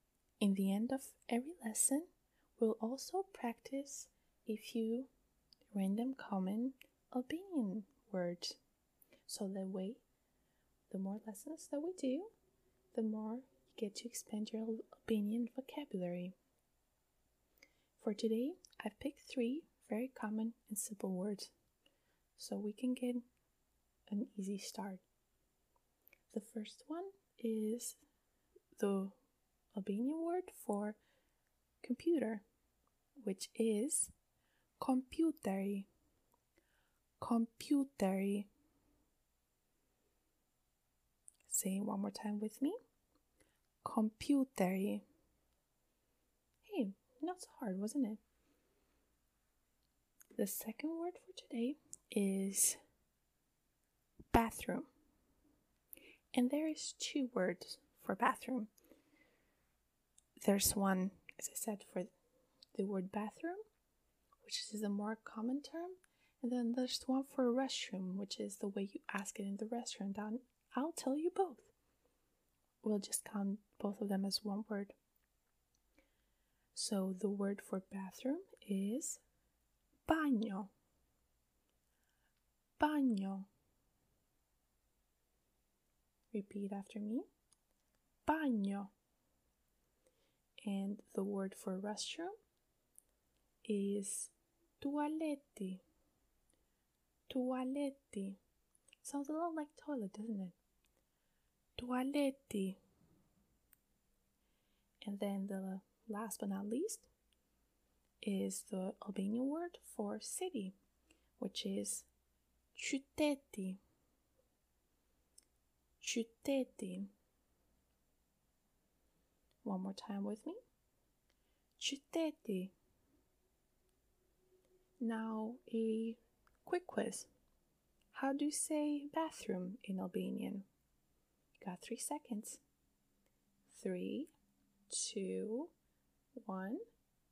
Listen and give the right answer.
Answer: Banjo. Banjo.